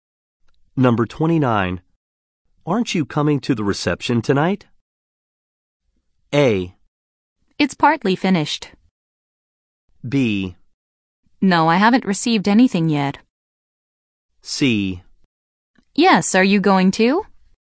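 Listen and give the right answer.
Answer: C: Yes, are you going to?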